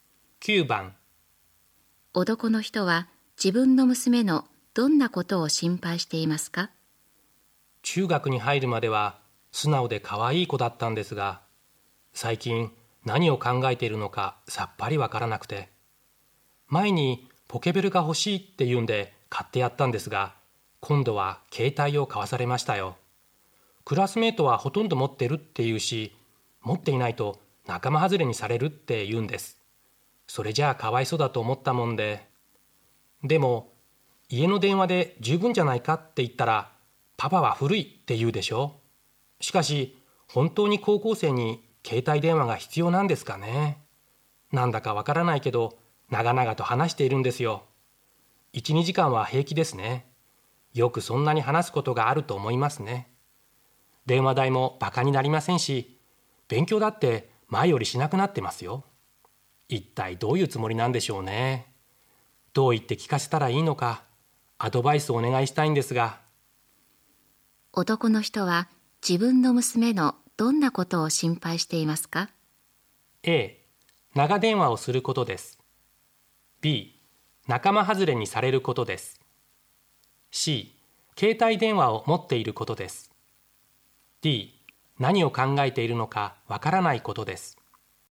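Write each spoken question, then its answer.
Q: 男の人は自分の娘のどんなことを心配していますか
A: A: 長電話をすることです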